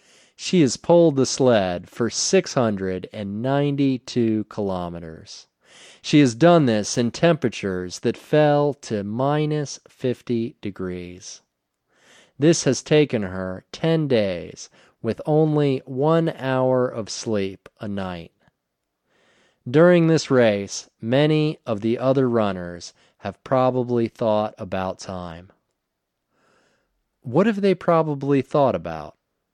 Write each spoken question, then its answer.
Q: What have they probably thought about?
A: They have probably thought about time.